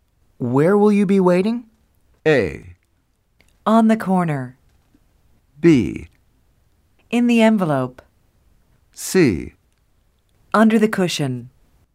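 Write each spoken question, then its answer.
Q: Where will you be waiting?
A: A: On the corner.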